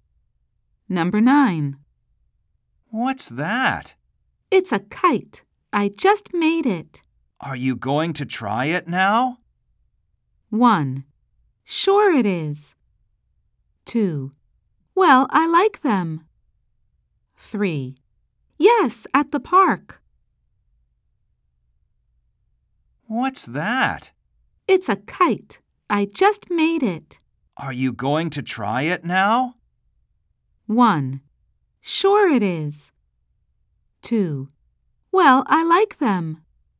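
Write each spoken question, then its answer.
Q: Are you going to try it now?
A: 3: Yes, at the park.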